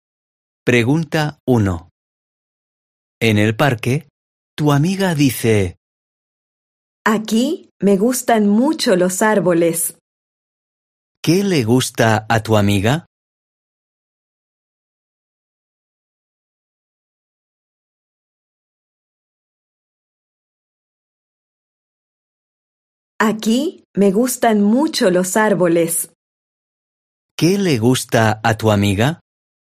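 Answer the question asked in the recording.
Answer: los árboles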